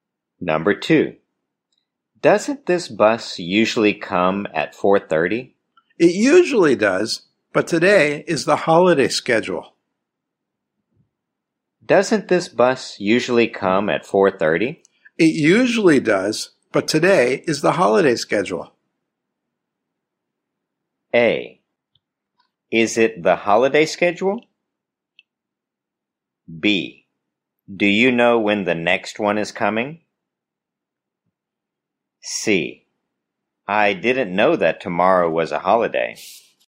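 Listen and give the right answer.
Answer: B: Do you know when the next one is coming?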